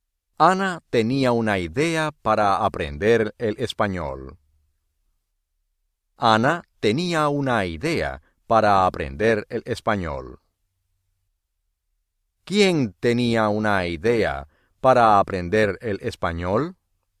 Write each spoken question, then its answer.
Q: ¿Quién tenía una idea para aprender el español?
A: Ana.